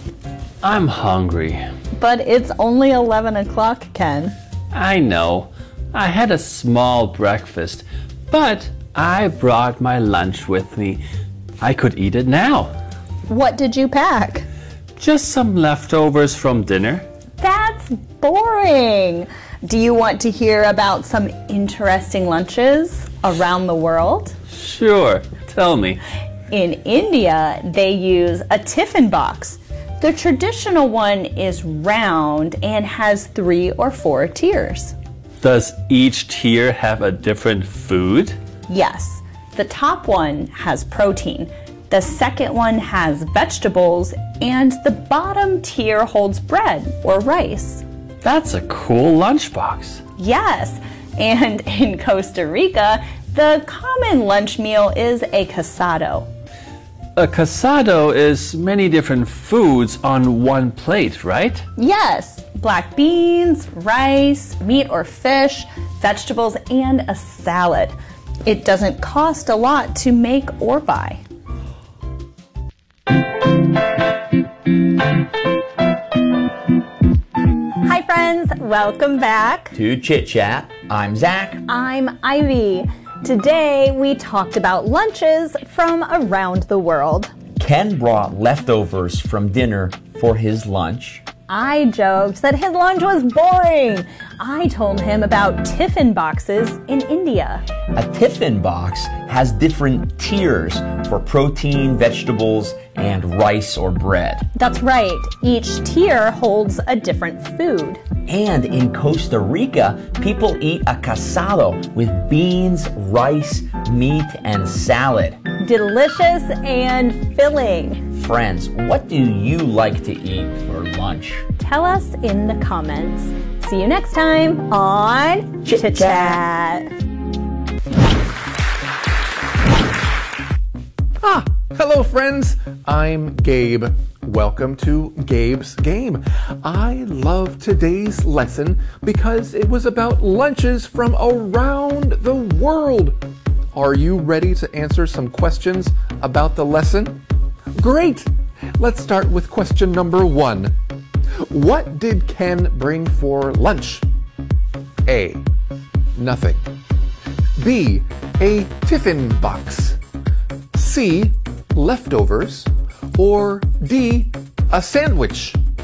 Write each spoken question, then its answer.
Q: What did Ken bring for lunch?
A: Friends, if you said C. Leftovers, you're right!